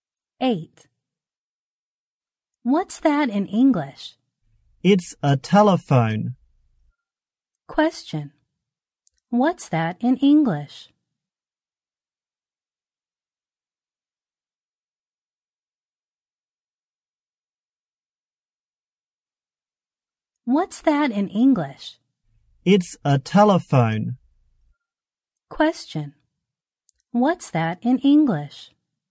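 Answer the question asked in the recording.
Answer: A telephone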